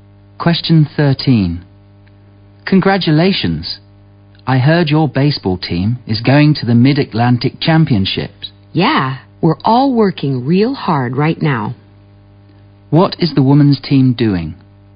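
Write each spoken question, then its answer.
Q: What is the women's team doing?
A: Training hard for the Mid-Atlantic Championships.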